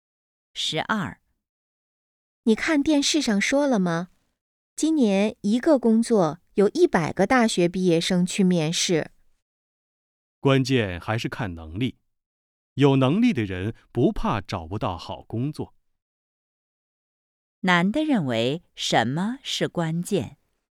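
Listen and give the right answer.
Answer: 能力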